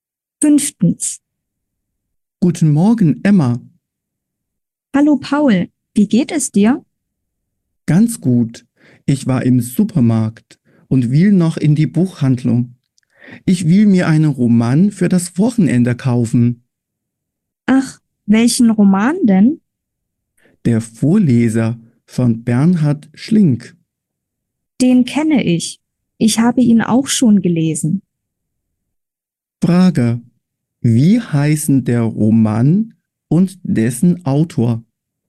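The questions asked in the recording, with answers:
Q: Wie heißen der Roman und dessen Autor?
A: Der Vorleser von Bernhard Schlink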